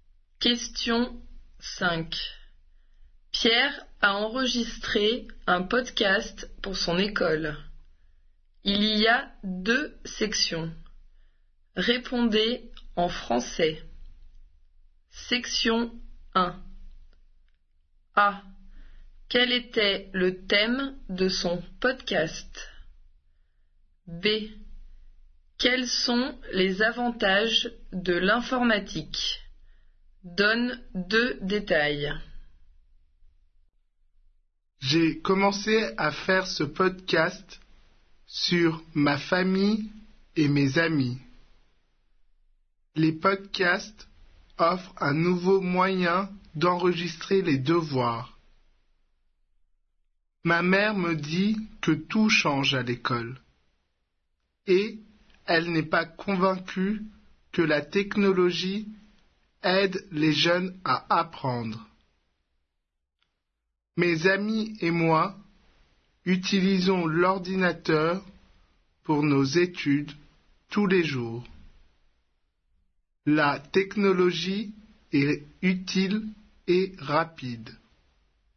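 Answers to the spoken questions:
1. Sa famille et ses amis
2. Elle est utile et rapide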